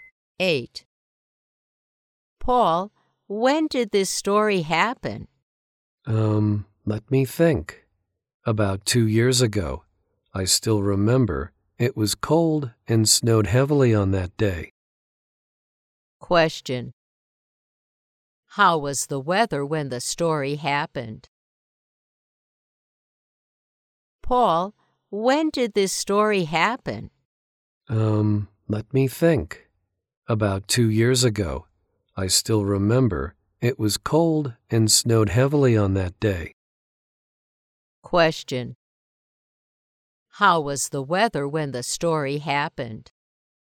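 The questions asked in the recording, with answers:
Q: How was the weather when the story happened?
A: Cold and snowy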